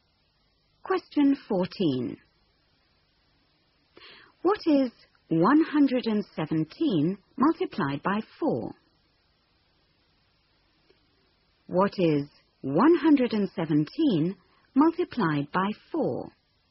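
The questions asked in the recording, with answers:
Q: What is 117 multiplied by 4?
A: 468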